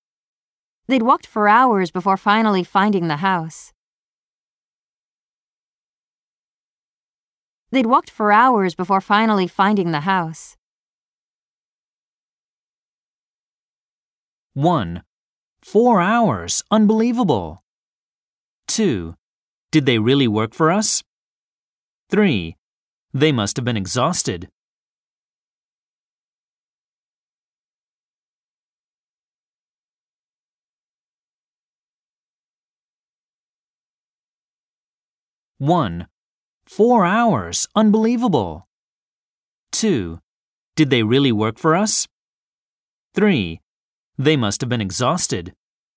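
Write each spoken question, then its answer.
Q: They'd walked for hours before finally finding the house.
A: 3: They must have been exhausted.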